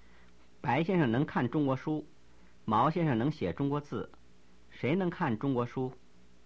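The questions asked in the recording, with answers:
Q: 谁能看中国书?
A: 白先生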